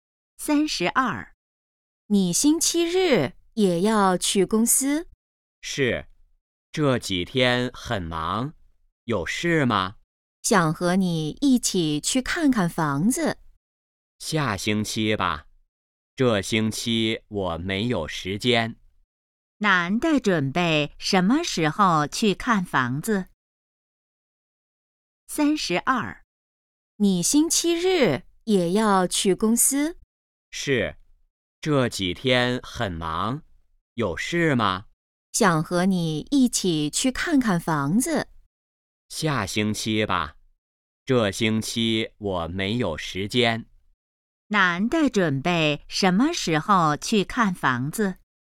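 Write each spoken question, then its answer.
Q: 男的准备什么时候去看房子?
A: 下星期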